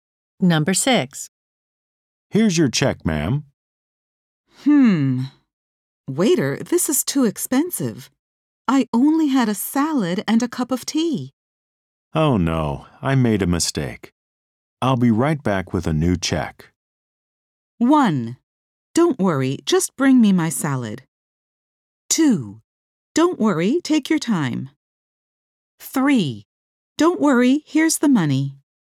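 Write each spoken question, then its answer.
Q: Oh no, I made a mistake. I'll be right back with a new check.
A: 2: Don't worry, take your time.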